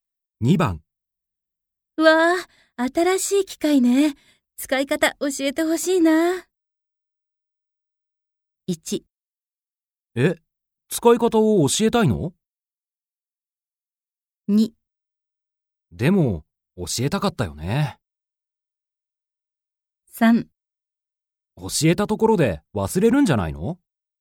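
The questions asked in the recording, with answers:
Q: わあ、新しい機械ね。使い方教えてほしいな。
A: 3: 教えたところで忘れるんじゃないの?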